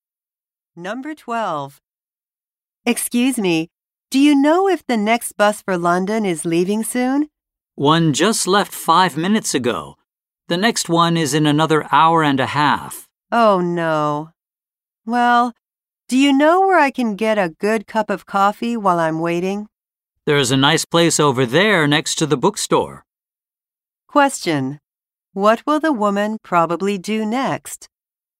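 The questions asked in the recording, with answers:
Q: What will the woman probably do next?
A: Get a cup of coffee at the place next to the bookstore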